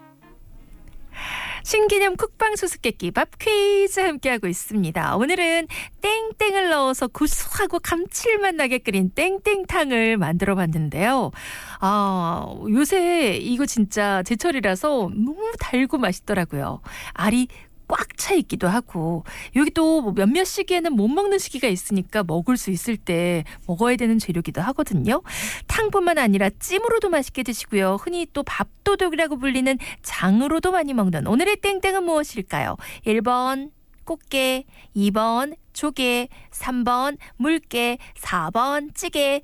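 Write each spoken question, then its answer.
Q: 탕뿐만 아니라 찜으로도 맛있게 드시고요. 흔히 또 밥도둑이라고 불리는 장으로도 많이 먹는 오늘의 땡땡은 무엇일까요?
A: 1: 꽃게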